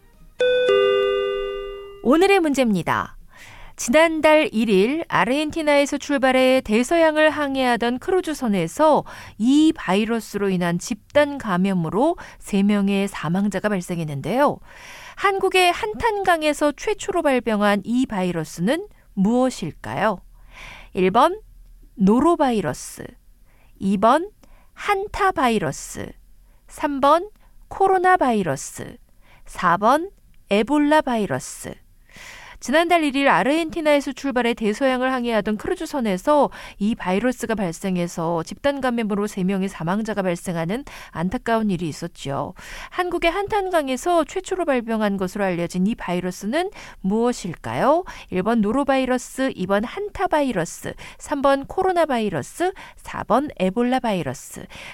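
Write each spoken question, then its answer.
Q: 한국의 한탄강에서 최초로 발병한 것으로 알려진 이 바이러스는 무엇일까요?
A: 2번: 한타바이러스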